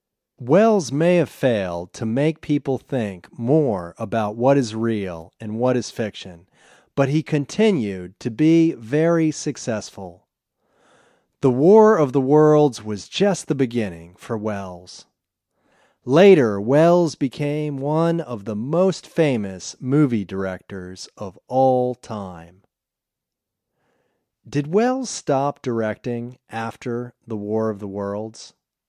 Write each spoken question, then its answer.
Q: Did Welles stop directing after The War of the Worlds?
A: No, he didn't stop directing after The War of the Worlds.